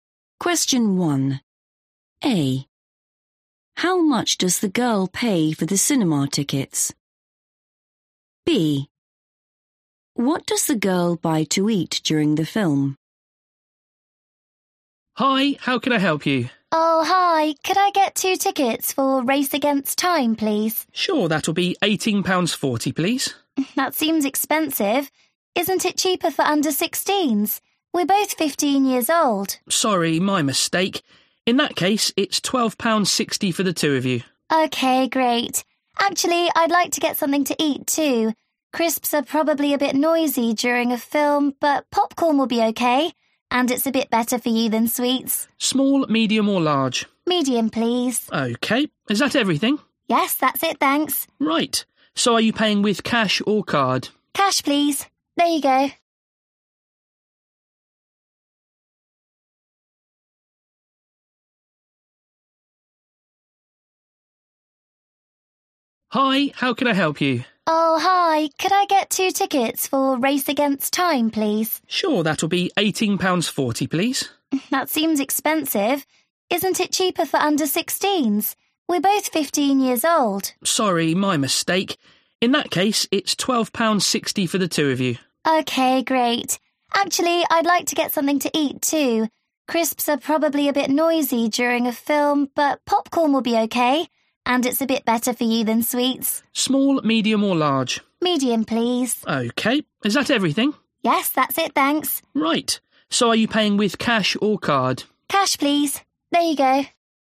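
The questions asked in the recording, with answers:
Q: How much does the girl pay for the cinema tickets?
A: £12.60

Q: What does the girl buy to eat during the film?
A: popcorn (medium)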